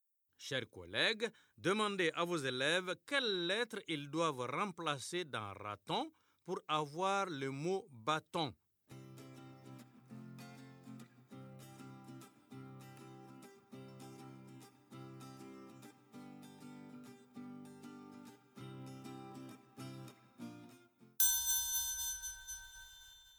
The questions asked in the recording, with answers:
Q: Chers collègues, demandez à vos élèves quelles lettres ils doivent remplacer dans raton pour avoir le mot bâton.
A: Dans raton, on remplace la lettre R par la lettre B pour avoir bâton.